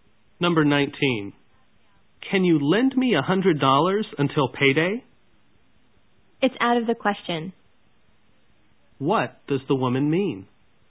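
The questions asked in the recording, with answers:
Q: What does the woman mean?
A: She won't lend him the $100.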